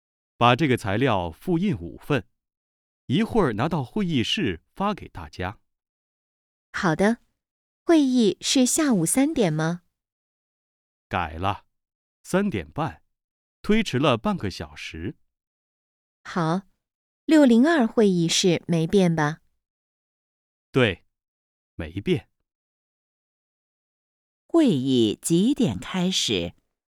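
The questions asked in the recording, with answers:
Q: 会议几点开始?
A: 三点半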